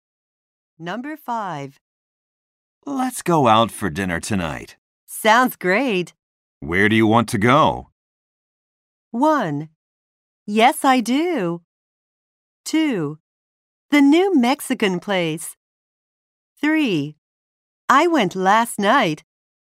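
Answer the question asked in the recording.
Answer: 2: The new Mexican place.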